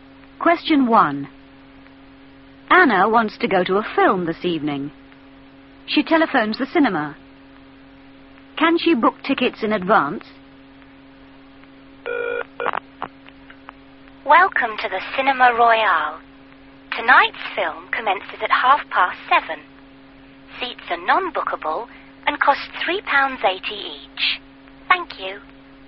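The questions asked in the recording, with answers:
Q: Can she book tickets in advance?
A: No, seats are non-bookable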